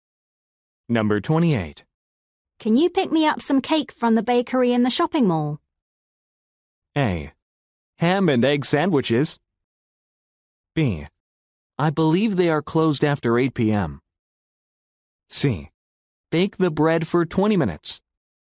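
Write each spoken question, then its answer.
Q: Can you pick me up some cake from the bakery in the shopping mall?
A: B: I believe they are closed after 8 p.m.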